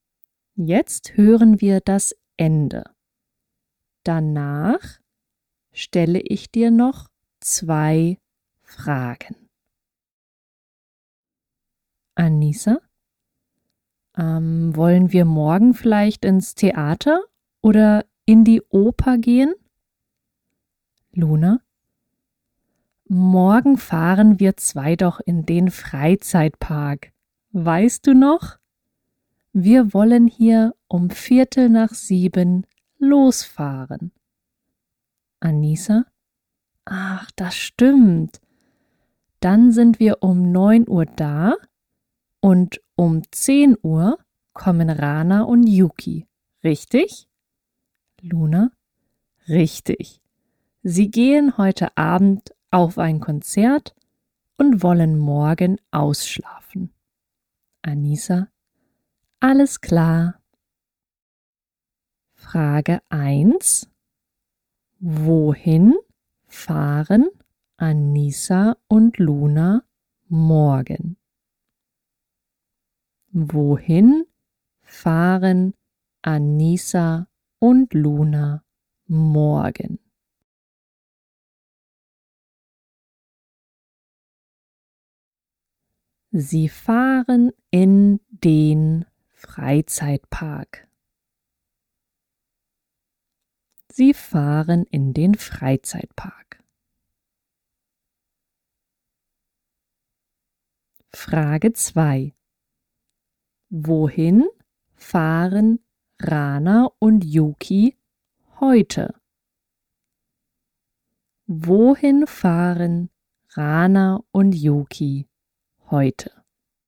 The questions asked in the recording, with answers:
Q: Wohin fahren Anissa und Luna morgen?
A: Sie fahren in den Freizeitpark.

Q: Wohin fahren Rana und Yuki heute?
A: Sie fahren auf ein Konzert.